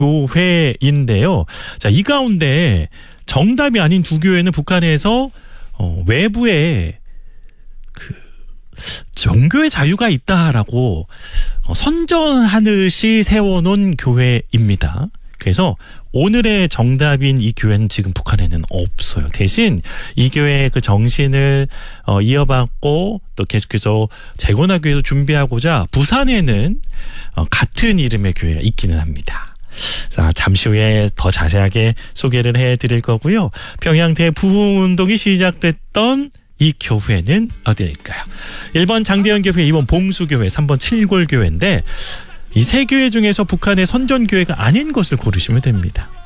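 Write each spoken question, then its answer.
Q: 평양대 부흥운동이 시작됐던 이 교회는 어디일까요?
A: 1번: 장대현 교회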